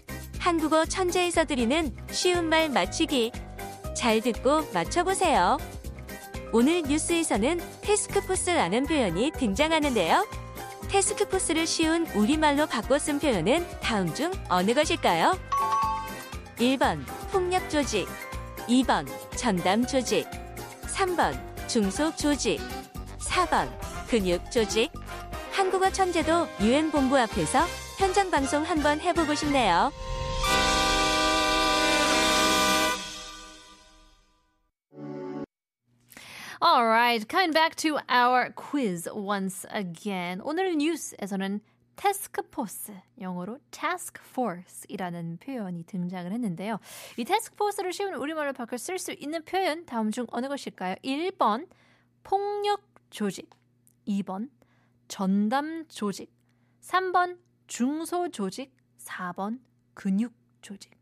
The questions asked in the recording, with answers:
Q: 테스크포스를 쉬운 우리말로 바꿔 쓴 표현은 다음 중 어느 것일까요?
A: 이게 바로 2번 전담 조직이라고 볼 수 있죠.